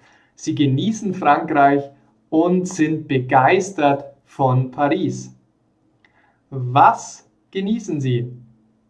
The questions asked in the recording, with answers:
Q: Was genießen Sie?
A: Frankreich. Sie genießen Frankreich.